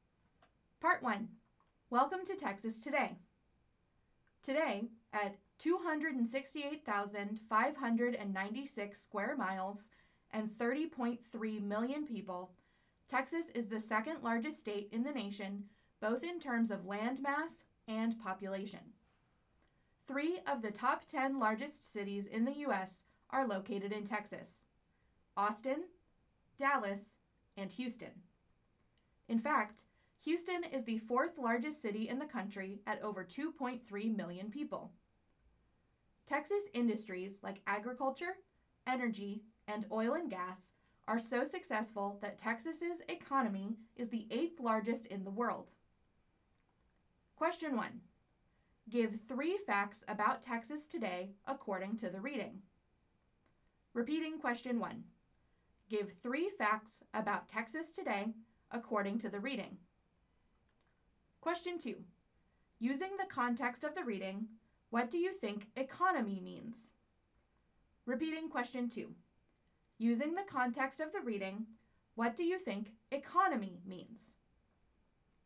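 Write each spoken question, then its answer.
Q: Give three facts about Texas today according to the reading.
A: e.g. Texas is the second largest state in land and population (30.3 million people); Austin, Dallas and Houston are among the 10 largest U.S. cities; its economy is the eighth largest in the world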